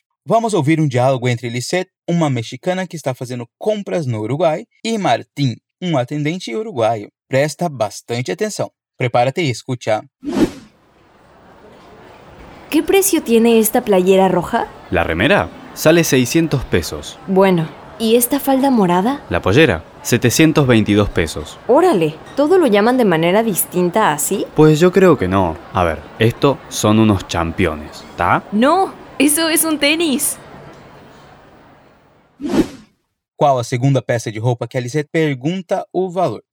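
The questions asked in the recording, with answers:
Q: es la segunda peça de ropa que Alicet pregunta o valor?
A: a saia roxa (falda morada)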